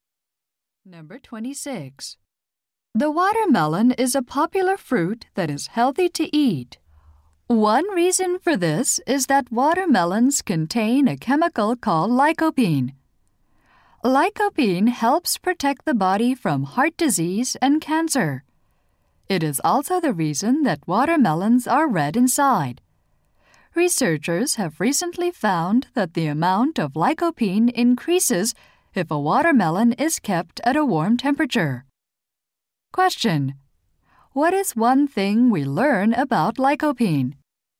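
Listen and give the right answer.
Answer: It makes watermelons red inside.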